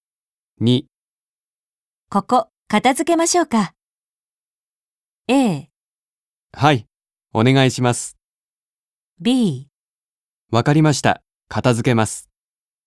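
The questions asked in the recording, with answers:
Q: ここ片付けましょうか。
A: A: はい、お願いします。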